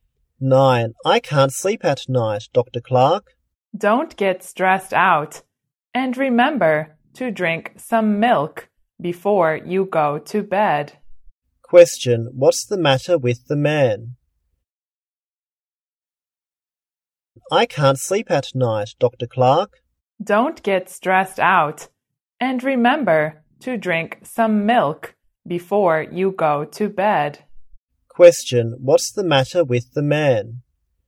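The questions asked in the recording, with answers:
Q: What's the matter with the man?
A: He can't sleep at night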